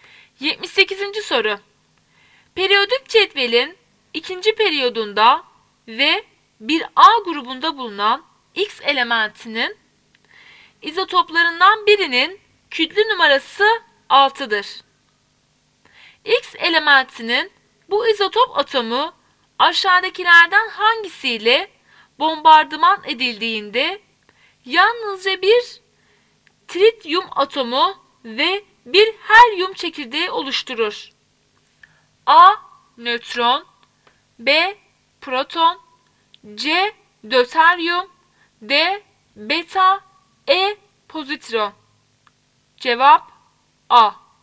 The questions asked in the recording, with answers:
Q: X elementinin bu izotop atomu aşağıdakilerden hangisiyle bombardıman edildiğinde yalnızca bir trityum atomu ve bir helyum çekirdeği oluşturur?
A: Cevap A.